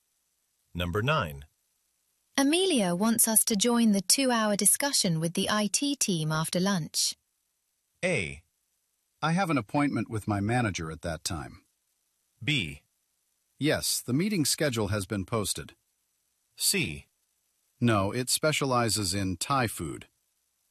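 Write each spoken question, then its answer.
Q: Amelia wants us to join the 2-hour discussion with the IT team after lunch.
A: A: I have an appointment with my manager at that time.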